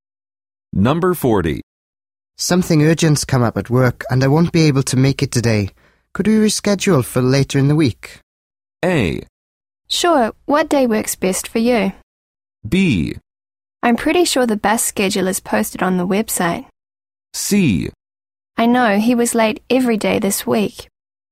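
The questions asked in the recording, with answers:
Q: Something urgent's come up at work and I won't be able to make it today. Could we reschedule for later in the week?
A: A: Sure, what day works best for you?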